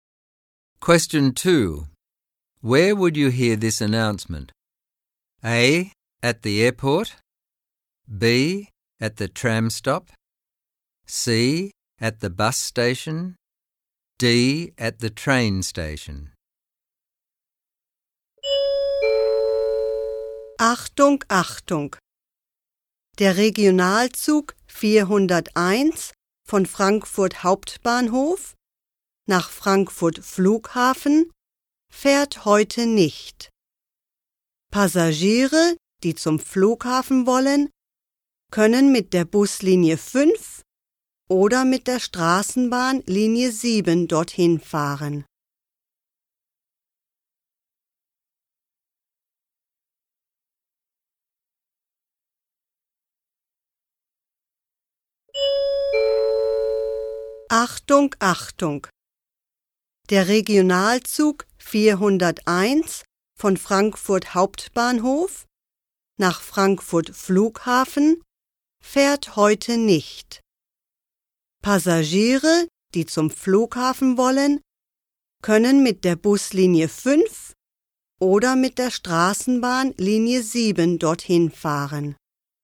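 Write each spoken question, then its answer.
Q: Where would you hear this announcement?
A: D: At the train station.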